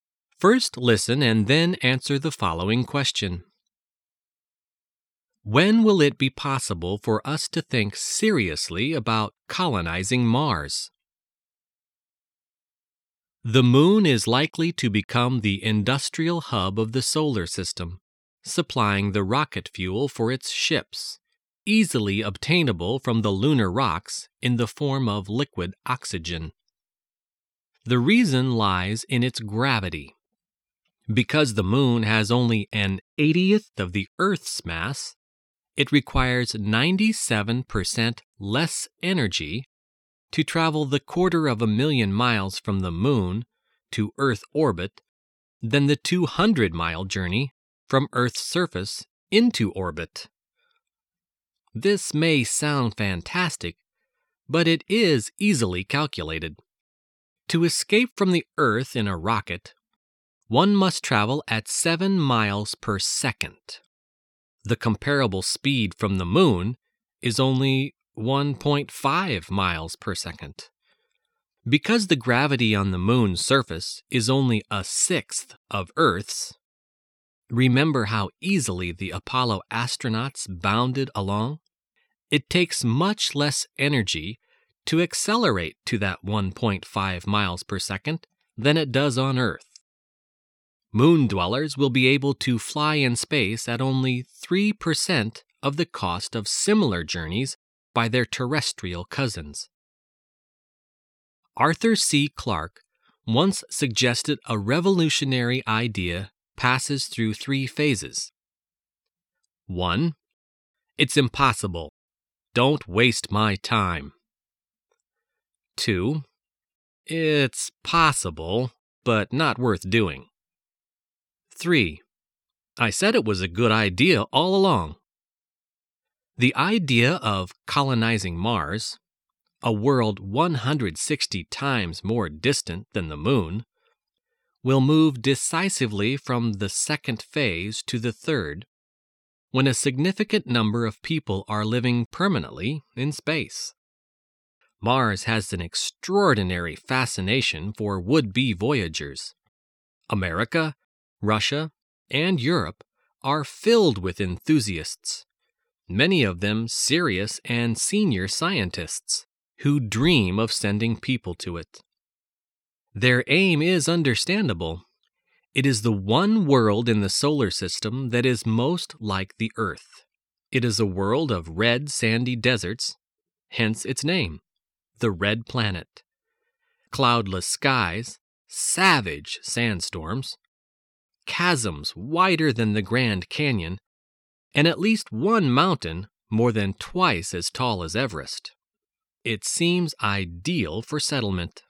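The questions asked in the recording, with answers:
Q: When will it be possible for us to think seriously about colonizing Mars?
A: When a significant number of people are living permanently in space.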